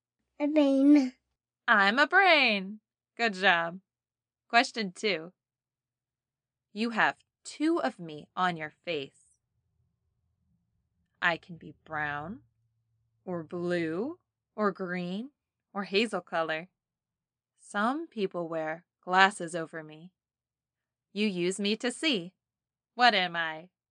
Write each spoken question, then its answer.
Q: You use me to see. What am I?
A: Eyes.